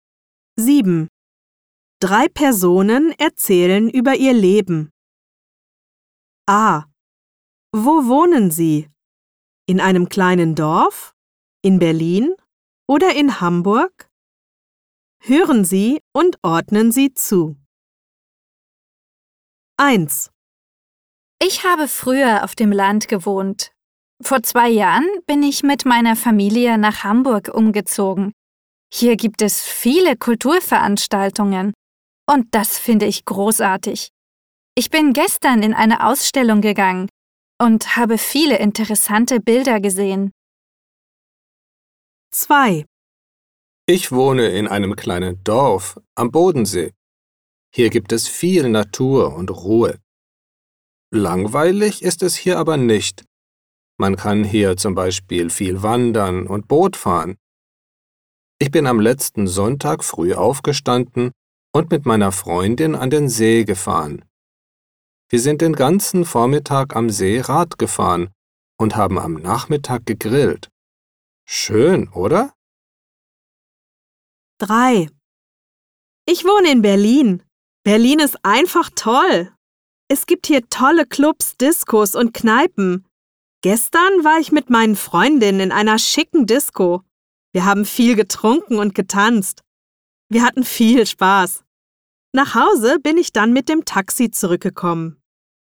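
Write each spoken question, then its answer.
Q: Wo wohnen Sie? In einem kleinen Dorf?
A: In Hamburg

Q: Wo wohnen Sie? In einem kleinen Dorf?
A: In einem kleinen Dorf (am Bodensee)

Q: Wo wohnen Sie? In einem kleinen Dorf?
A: In Berlin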